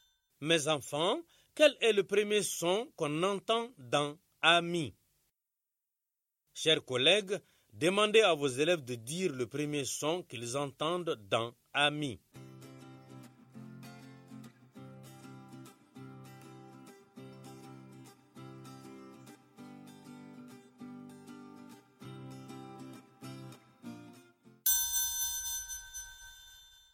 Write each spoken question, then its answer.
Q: Mes enfants, quel est le premier son qu'on entend dans « ami » ?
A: C'est A. Le son A.